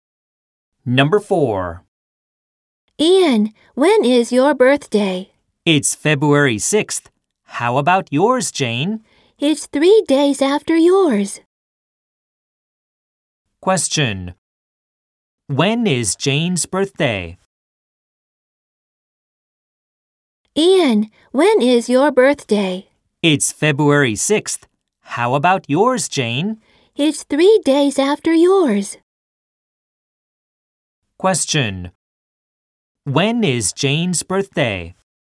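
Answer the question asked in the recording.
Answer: February 9th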